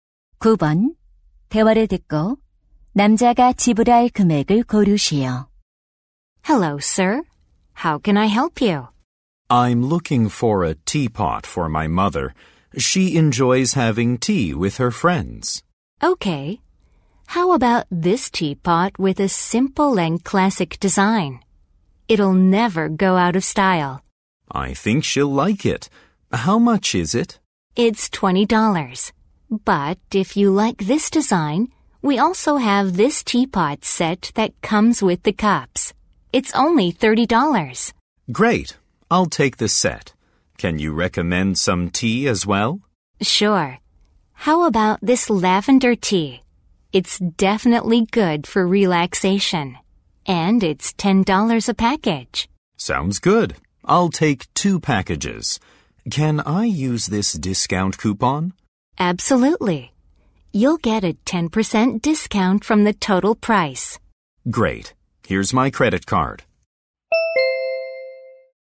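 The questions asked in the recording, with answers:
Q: 대화를 듣고 남자가 지불할 금액을 고르시오.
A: 45달러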